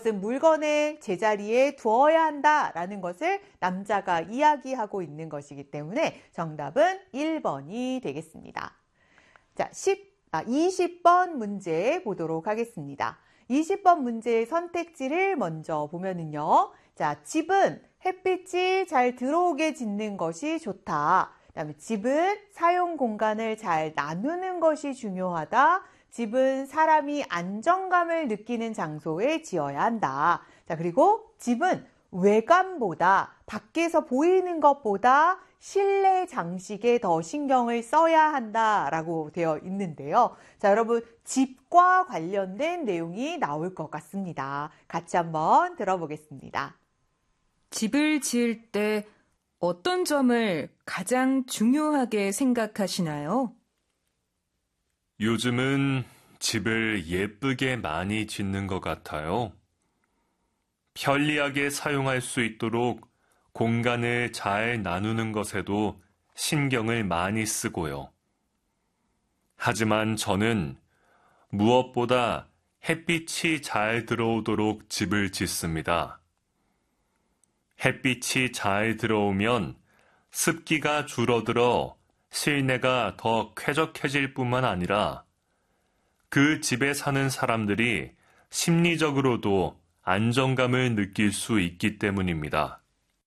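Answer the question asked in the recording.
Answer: 1: 집은 햇빛이 잘 들어오게 짓는 것이 좋다.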